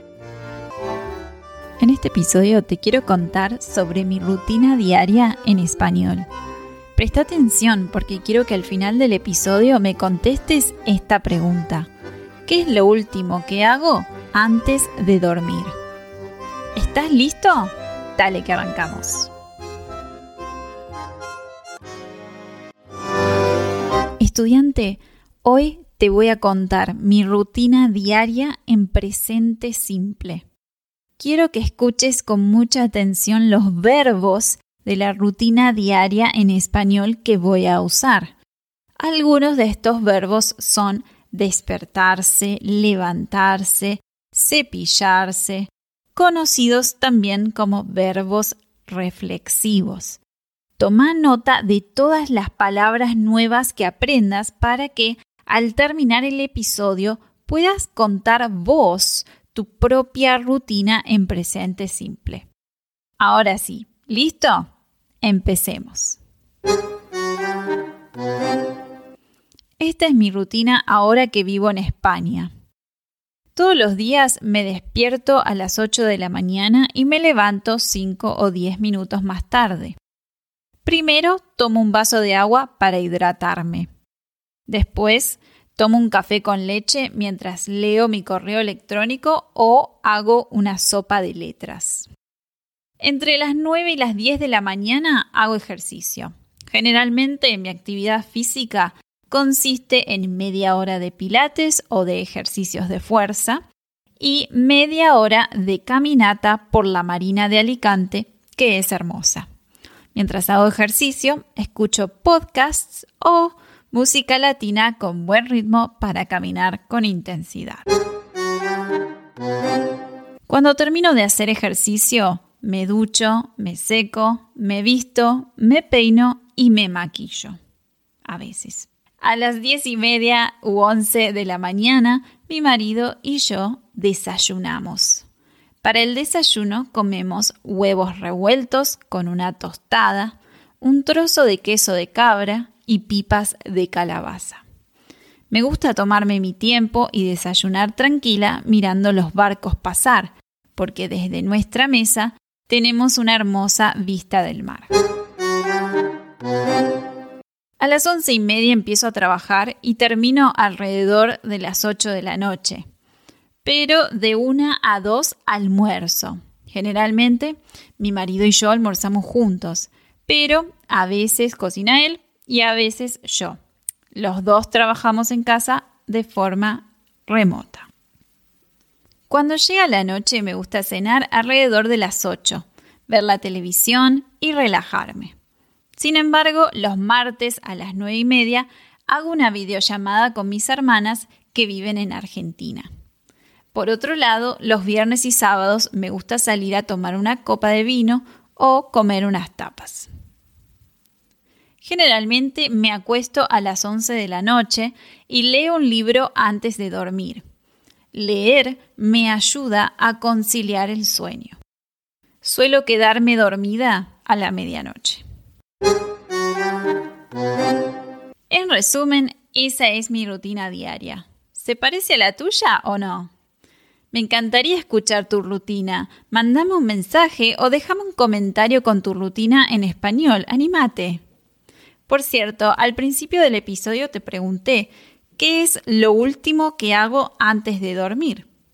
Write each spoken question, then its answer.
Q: ¿Qué es lo último que hago antes de dormir?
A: La respuesta es, leo un libro.